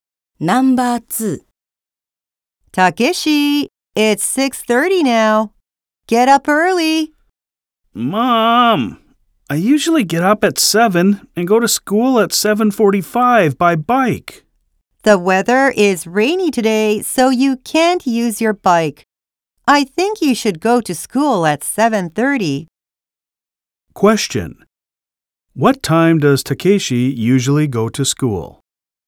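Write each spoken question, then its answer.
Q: What time does Takeshi usually go to school?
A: At 7:45.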